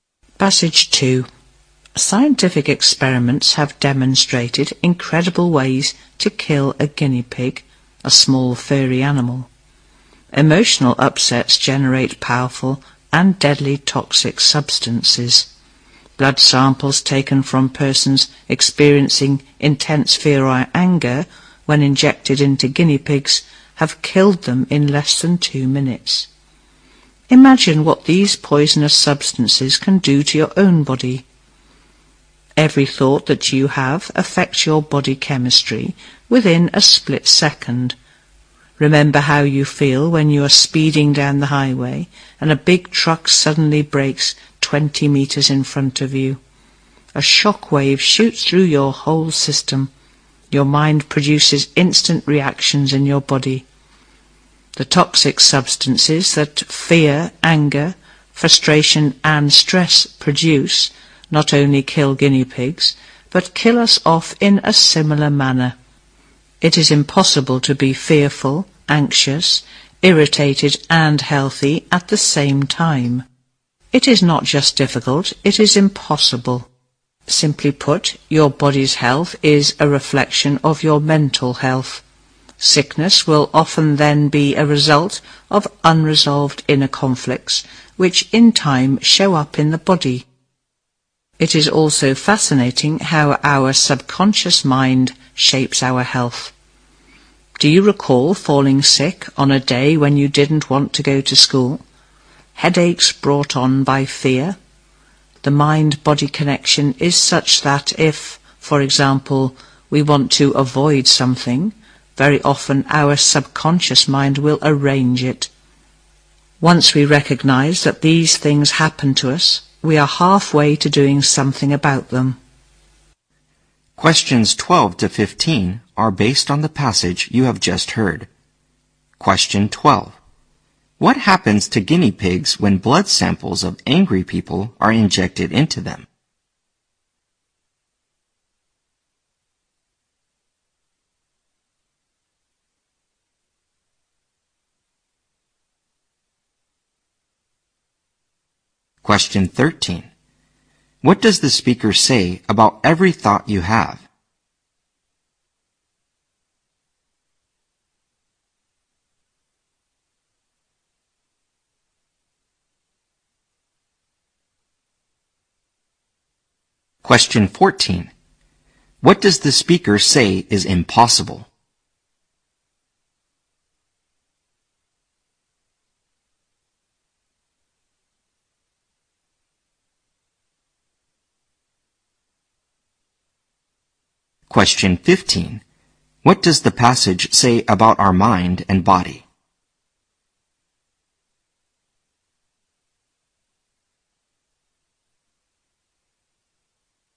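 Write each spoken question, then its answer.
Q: What happens to guinea pigs when blood samples of angry people are injected into them?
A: They die in less than 2 minutes

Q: What does the speaker say about every thought you have?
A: It affects your body chemistry within a split second

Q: What does the speaker say is impossible?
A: To be fearful, anxious, irritated and healthy at the same time

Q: What does the passage say about our mind and body?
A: The body's health reflects mental health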